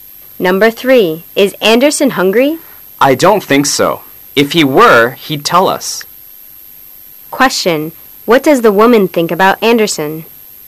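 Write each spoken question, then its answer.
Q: what does the woman think about Anderson?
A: He isn't hungry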